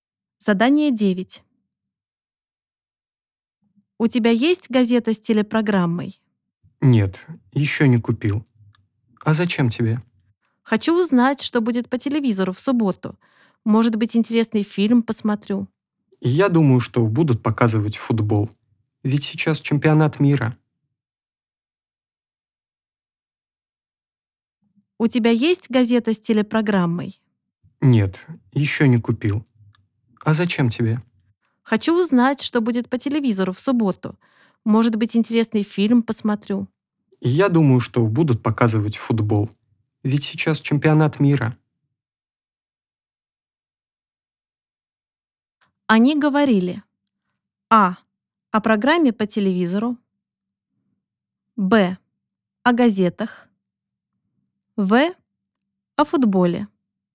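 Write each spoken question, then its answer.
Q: Они говорили:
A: А: о программе по телевизору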